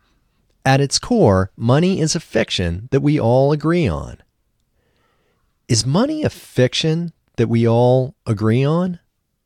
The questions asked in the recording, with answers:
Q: Is money a fiction that we all agree on?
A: Yes, money is a fiction that we all agree on.